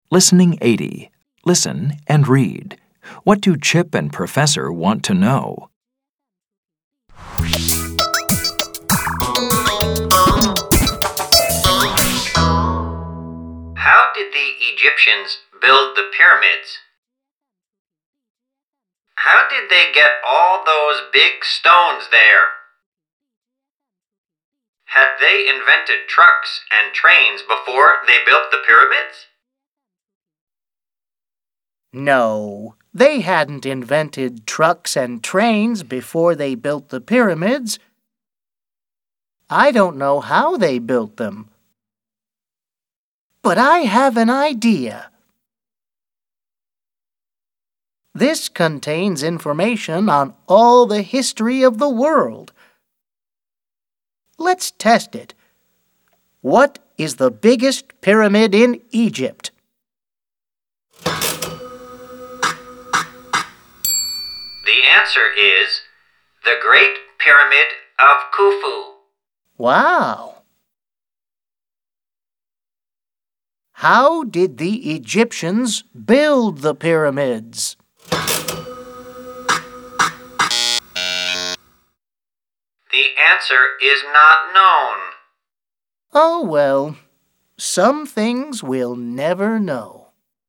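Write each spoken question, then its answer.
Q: What do Chip and Professor want to know?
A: How the Egyptians built the pyramids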